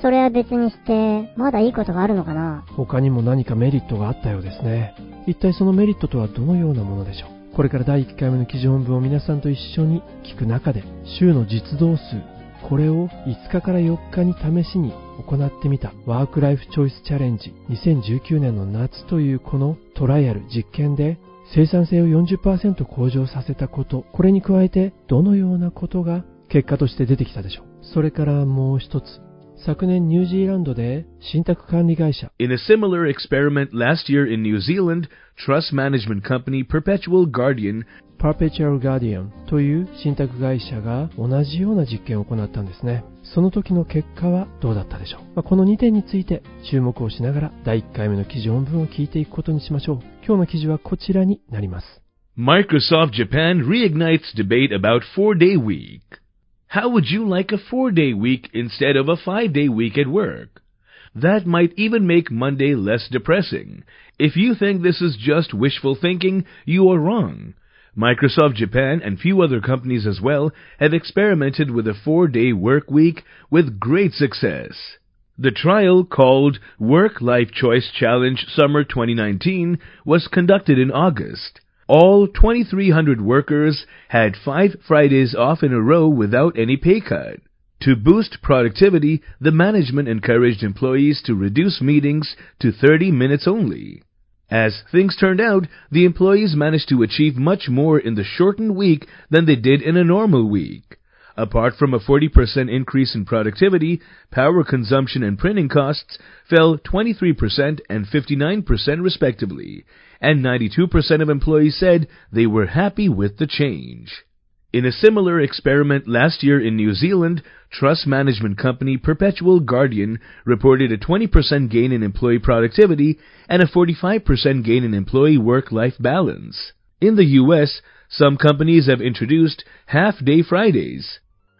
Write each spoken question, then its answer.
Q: 一体そのメリットとはどのようなものでしょう。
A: 電力消費と印刷経費、これはそれぞれ 23% そして 59% fell、 下げることができたんです。

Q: その時の結果はどうだったでしょう。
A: In a similar experiment last year in New Zealand, trust management company Perpetual Guardian reported a 20% gain in employee productivity and a 45% gain in employee work-life balance.